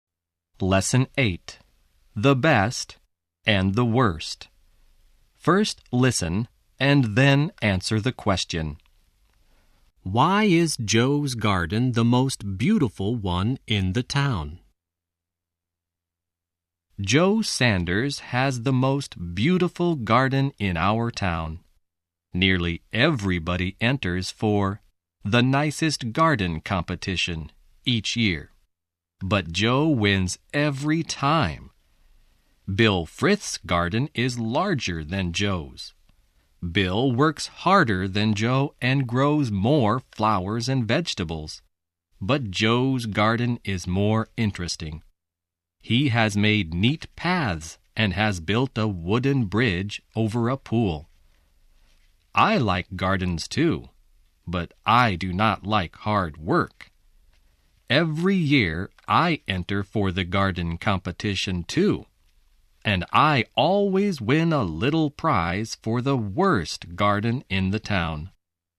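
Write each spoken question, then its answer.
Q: Why is Joe's garden the most beautiful one in the town?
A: Because it is more interesting: he has made neat paths and built a wooden bridge over a pool.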